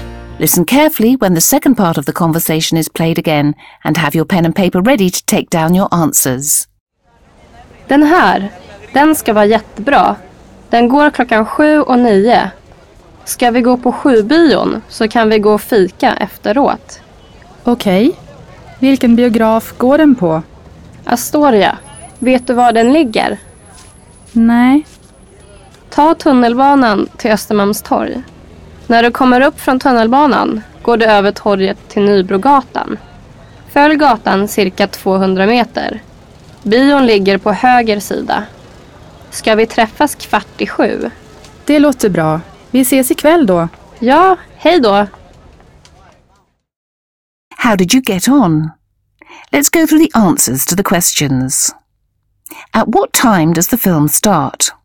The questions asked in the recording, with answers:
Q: At what time does the film start?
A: The film that Maria thinks that they should see is screened at 7 and at 9 o'clock.